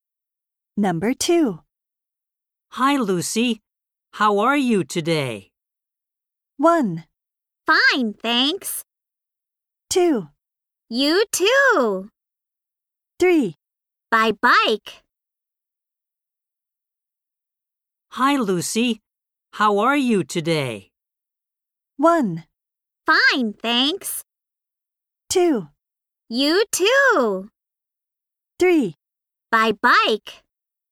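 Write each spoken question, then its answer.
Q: Hi, Lucy. How are you today?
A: 1: Fine, thanks.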